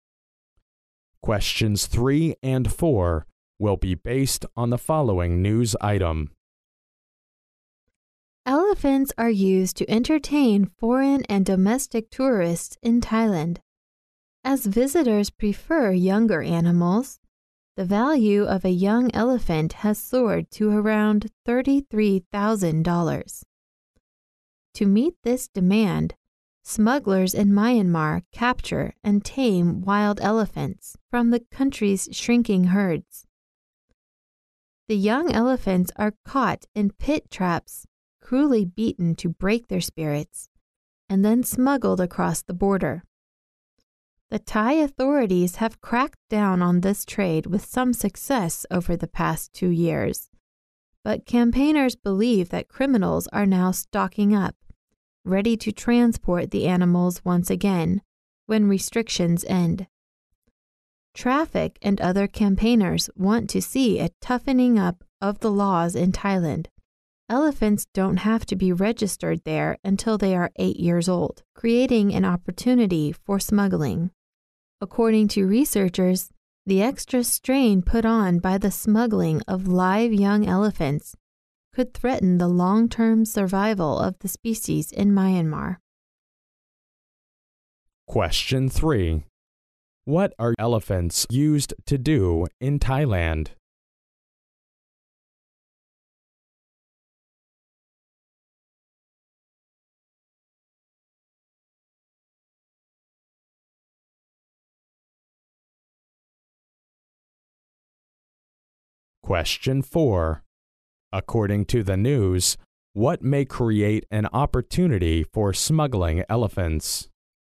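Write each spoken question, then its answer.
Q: What are elephants used to do in Thailand?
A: To entertain foreign and domestic tourists

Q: According to the news, what may create an opportunity for smuggling elephants?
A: Elephants don't have to be registered until they are 8 years old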